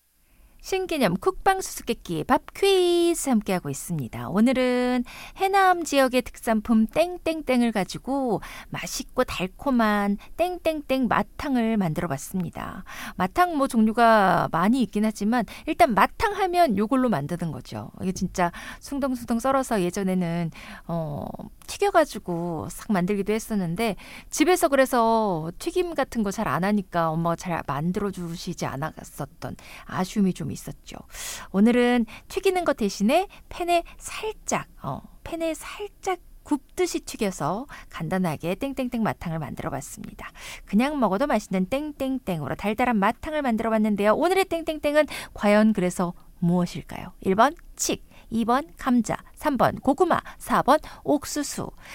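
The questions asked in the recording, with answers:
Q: 오늘의 땡땡땡은 과연 그래서 무엇일까요? 1번 칡, 2번 감자, 3번 고구마, 4번 옥수수.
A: 3번: 고구마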